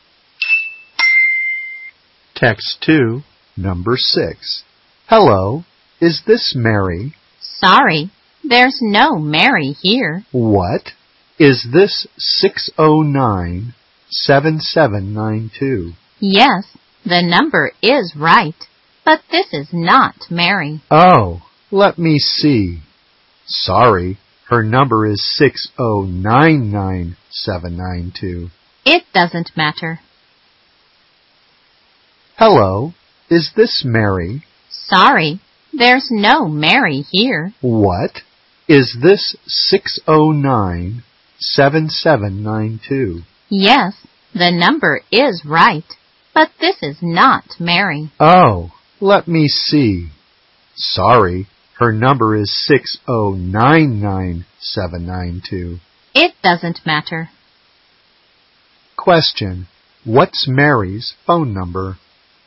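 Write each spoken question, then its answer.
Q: Question, what's Mary's phone number?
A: 609-9792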